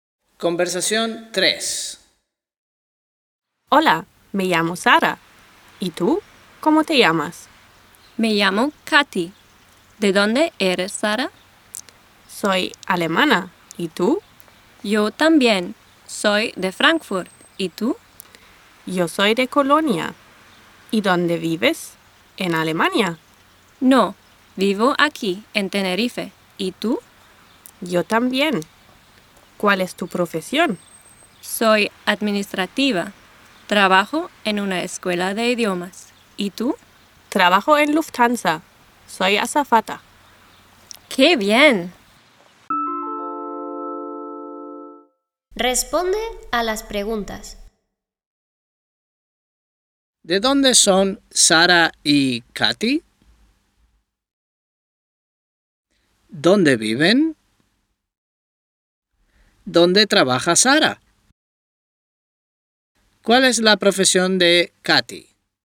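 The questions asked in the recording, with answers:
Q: ¿Dónde viven?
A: En Tenerife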